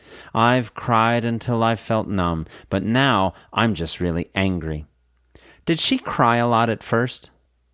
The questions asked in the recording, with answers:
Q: Did she cry a lot at first?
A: Yes, she cried until she felt numb.